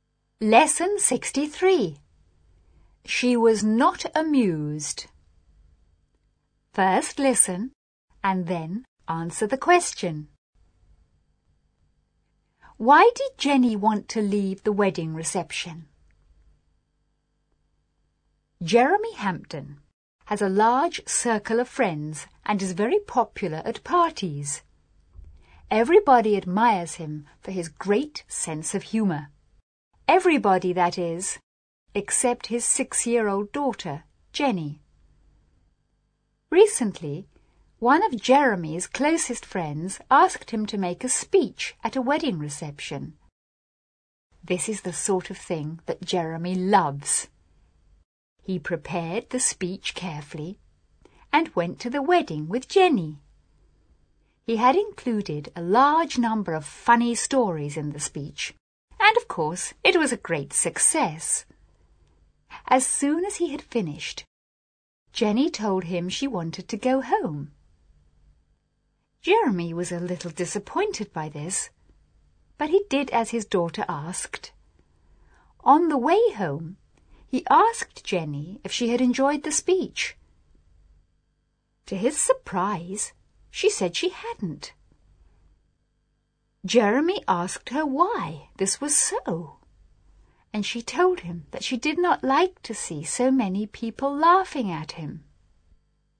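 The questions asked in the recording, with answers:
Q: Why did Jenny want to leave the wedding reception?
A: She did not like to see so many people laughing at her father.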